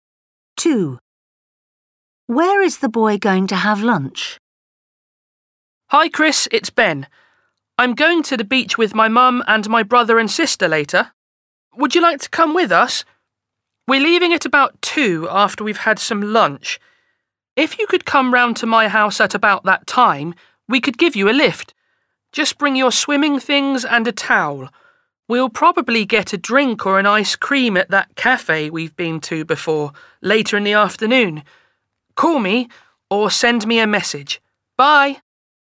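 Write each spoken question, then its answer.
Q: Where is the boy going to have lunch?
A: at home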